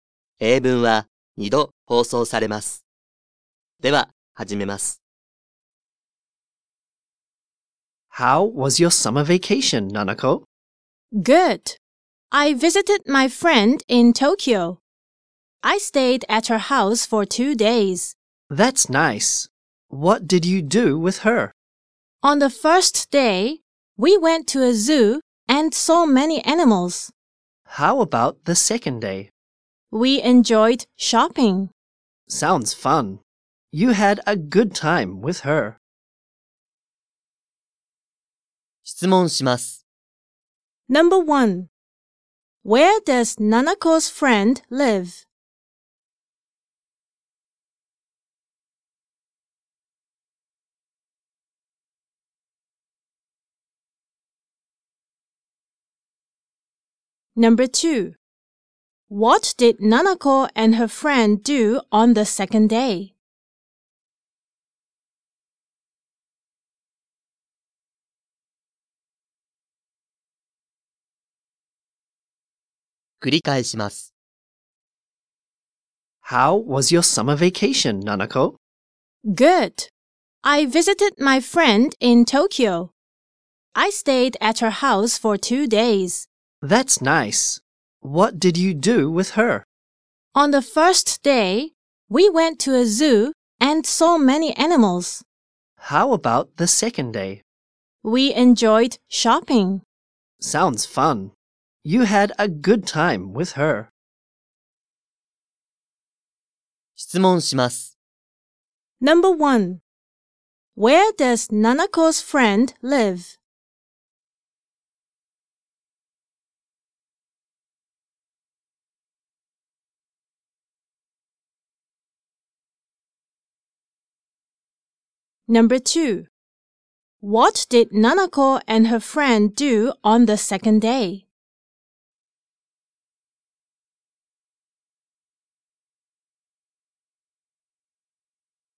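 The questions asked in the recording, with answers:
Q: Where does Nanako's friend live?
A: In Tokyo.

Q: What did Nanako and her friend do on the second day?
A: They enjoyed shopping.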